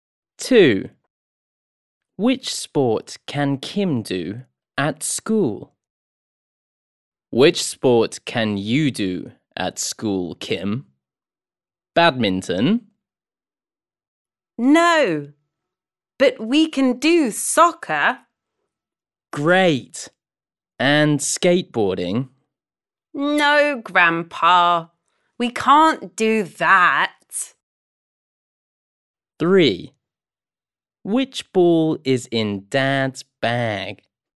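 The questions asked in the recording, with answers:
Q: Which sport can Kim do at school?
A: soccer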